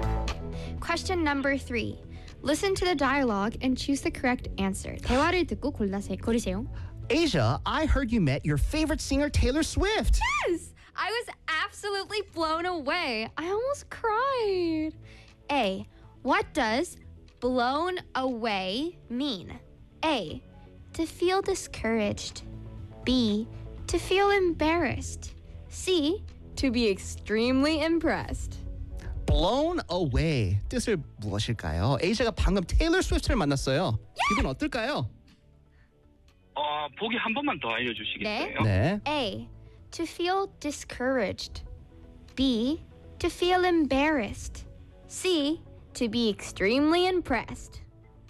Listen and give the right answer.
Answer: C입니다. 예.